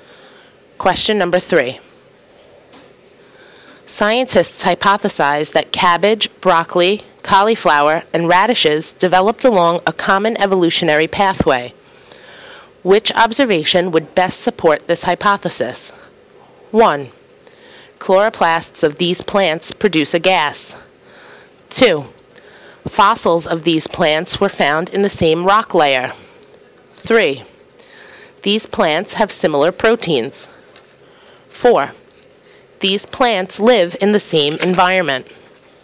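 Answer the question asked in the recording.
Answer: 3: these plants have similar proteins.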